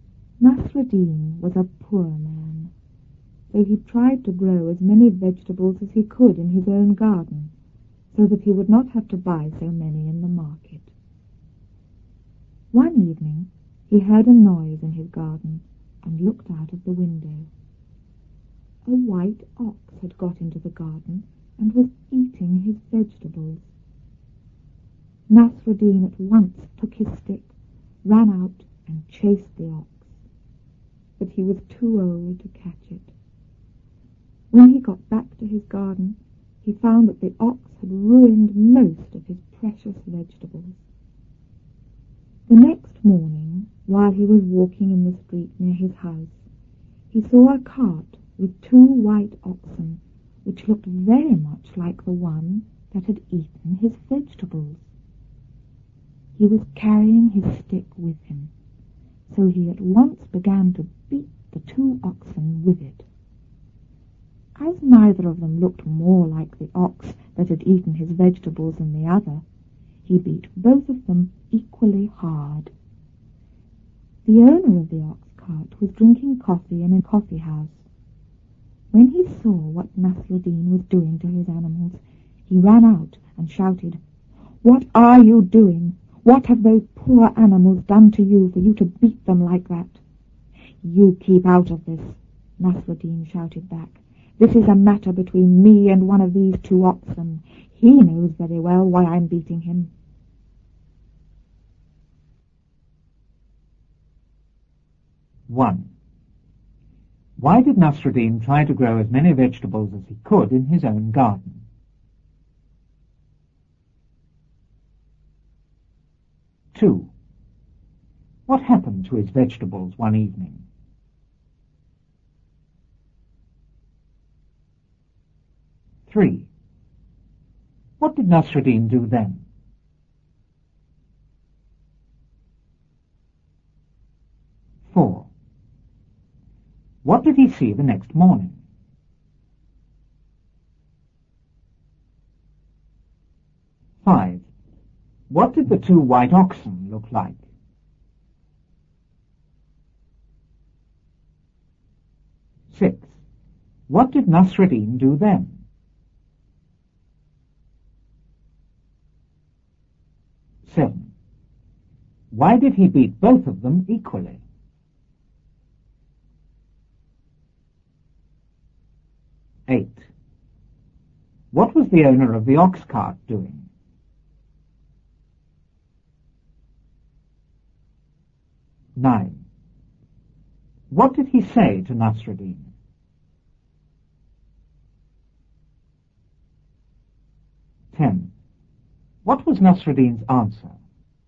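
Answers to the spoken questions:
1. So that he would not have to buy so many in the market (he was poor).
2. A white ox got into the garden and ate them.
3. He took his stick, ran out and chased the ox.
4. A cart with two white oxen.
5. Very much like the ox that had eaten his vegetables.
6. He beat the two oxen with his stick.
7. Neither looked more like the ox that ate his vegetables than the other.
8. Drinking coffee in a coffee house.
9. "What are you doing? What have those poor animals done to you for you to beat them like that?"
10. "Keep out of this. This is a matter between me and one of these two oxen. He knows very well why I'm beating him."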